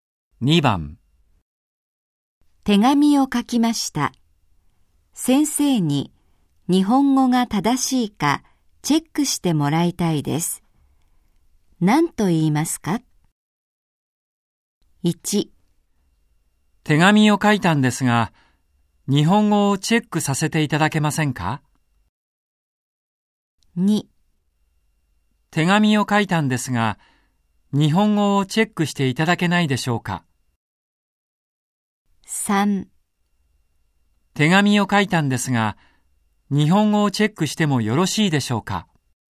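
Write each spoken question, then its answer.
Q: 何と言いますか?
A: 2: 手紙を書いたんですが、日本語をチェックしていただけないでしょうか。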